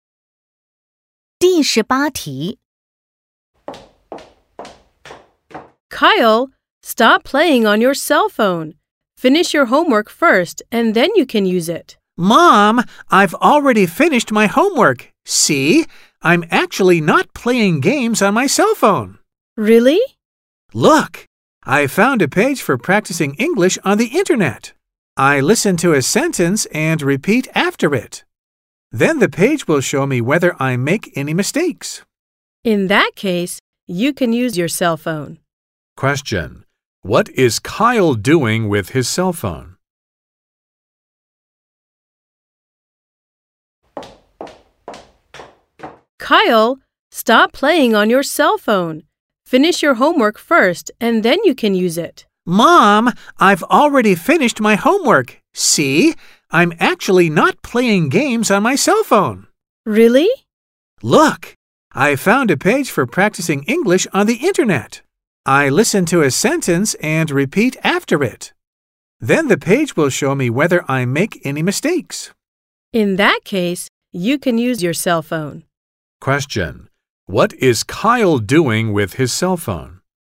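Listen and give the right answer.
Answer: Practicing English on the internet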